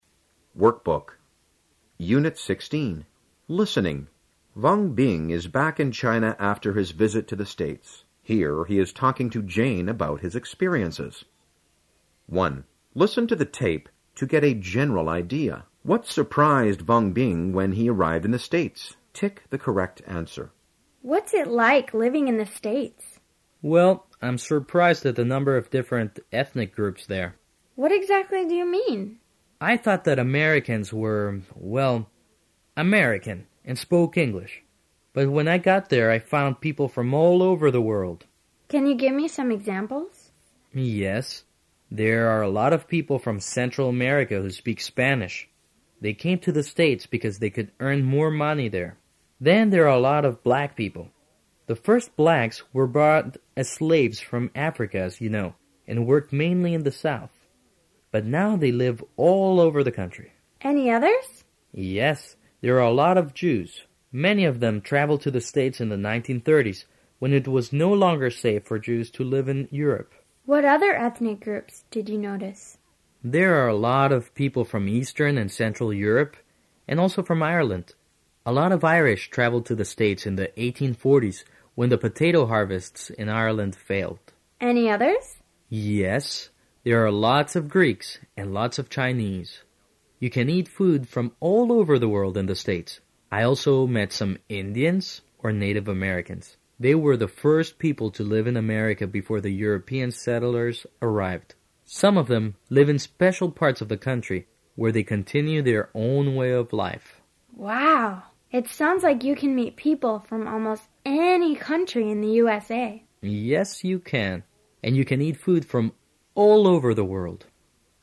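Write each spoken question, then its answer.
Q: What surprised Wang Bing when he arrived in the States?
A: The number of different ethnic groups there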